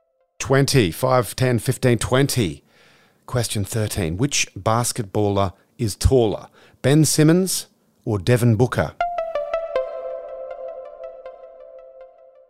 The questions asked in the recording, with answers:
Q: Which basketballer is taller, Ben Simmons or Devin Booker?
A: Ben Simmons at 6'11" is 7 inches taller.